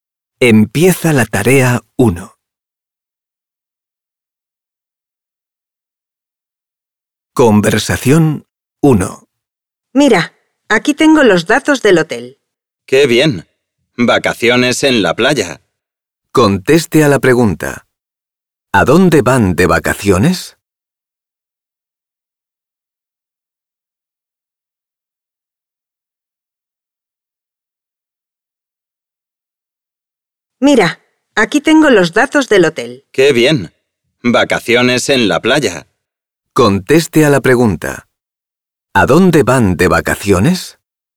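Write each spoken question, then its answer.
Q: ¿A dónde van de vacaciones?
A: A la playa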